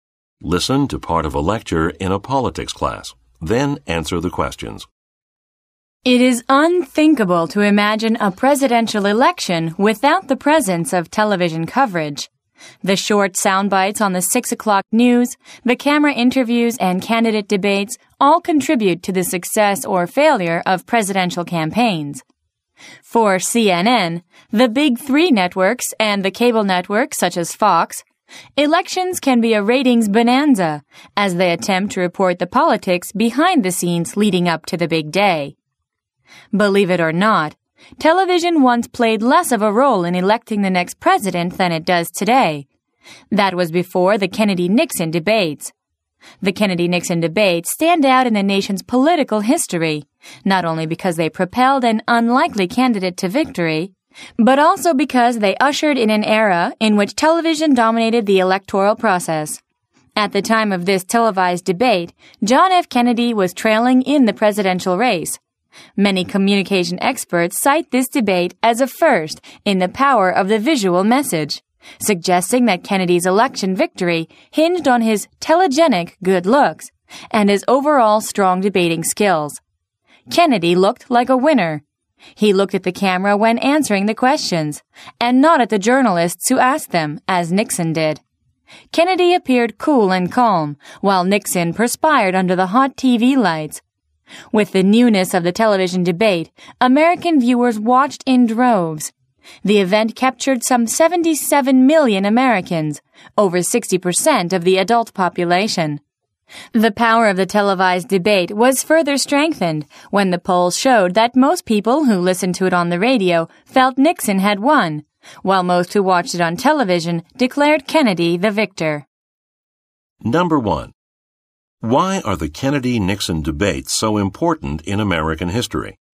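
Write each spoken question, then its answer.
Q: Why are the Kennedy-Nixon debates so important in American history?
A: They helped an unlikely candidate win and began an era in which television dominated the electoral process.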